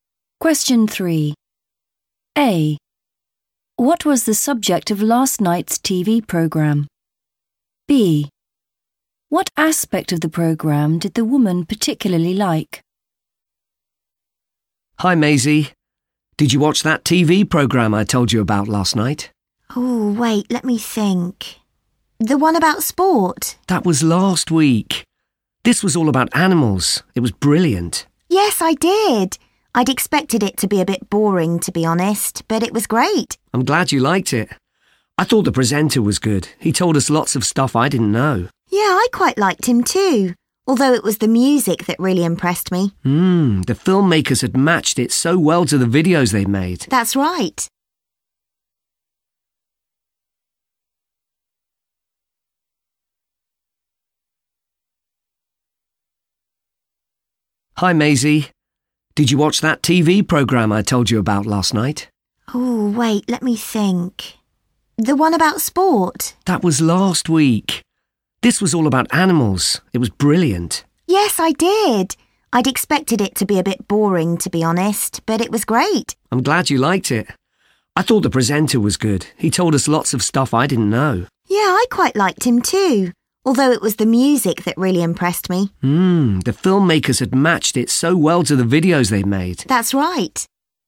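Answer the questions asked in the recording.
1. animals
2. the music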